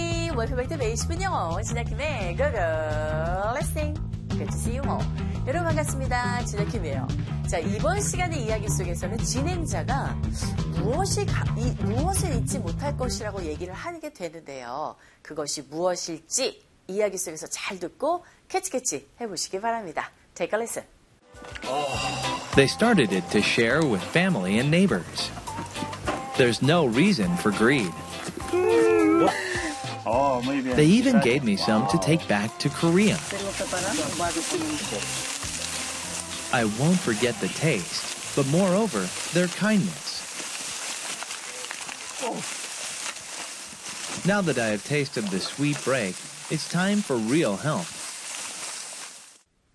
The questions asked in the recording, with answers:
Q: 진행자가 무엇을 잊지 못할 것이라고 얘기를 하게 되는데요. 그것이 무엇일지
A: 맛도 맛이지만 그들의 친절함을 잊지 못할 것이라고 합니다.